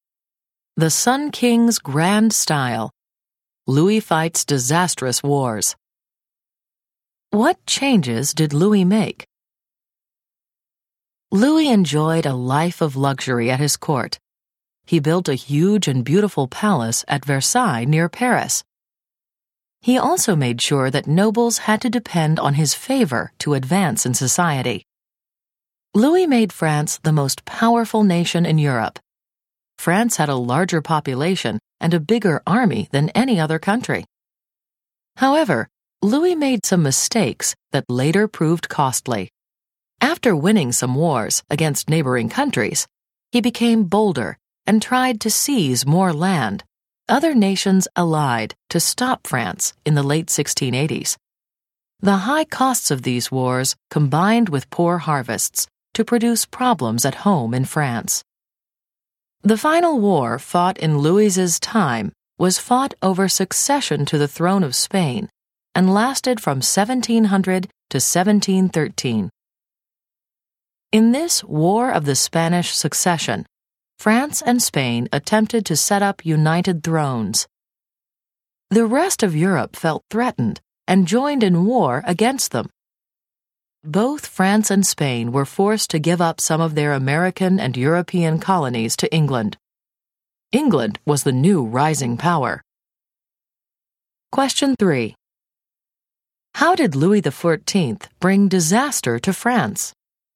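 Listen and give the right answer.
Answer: His costly wars, together with poor harvests, caused problems at home, and France lost colonies in the War of the Spanish Succession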